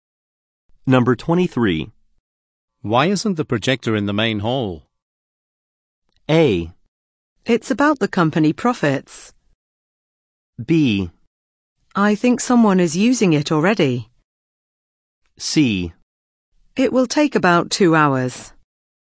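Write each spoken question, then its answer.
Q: Why isn't the projector in the main hall?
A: B: I think someone is using it already.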